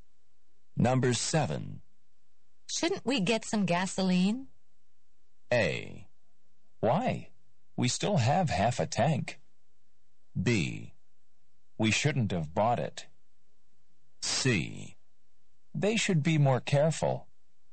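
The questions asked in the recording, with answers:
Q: Shouldn't we get some gasoline?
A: A: Why? We still have half a tank.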